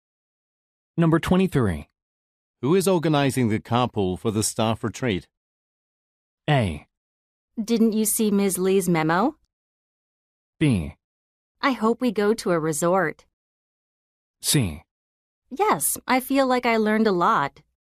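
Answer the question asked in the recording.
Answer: A: Didn't you see Ms. Lee's memo?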